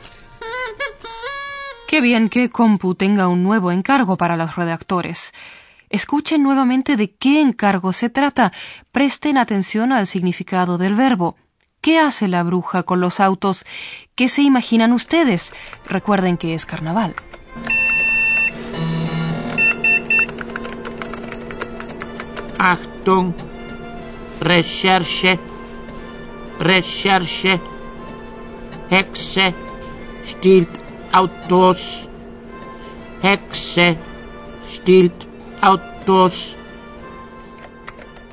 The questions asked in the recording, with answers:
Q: ¿Qué hace la bruja con los autos?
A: La bruja se aprovecha del disfraz de carnaval para robar autos.